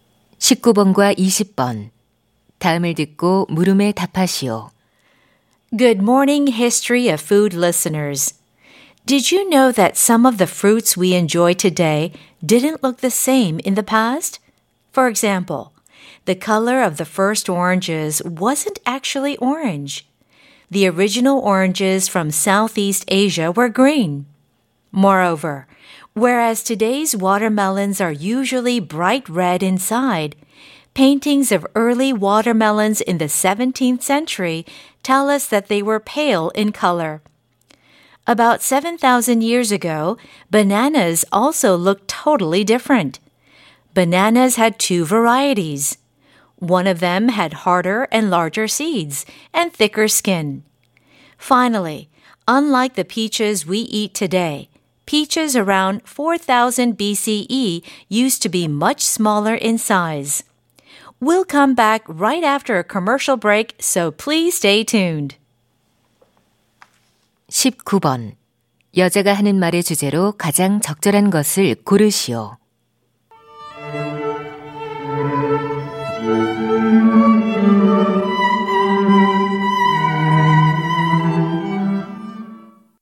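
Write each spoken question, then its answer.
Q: 여자가 하는 말의 주제로 가장 적절한 것을 고르시오.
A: 과거에는 지금과 모습이 달랐던 과일들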